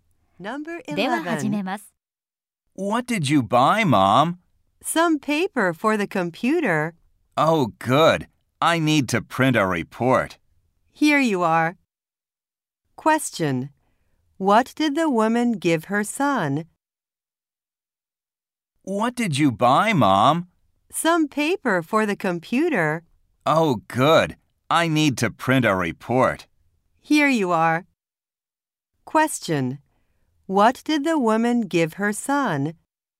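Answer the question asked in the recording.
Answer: Some paper for the computer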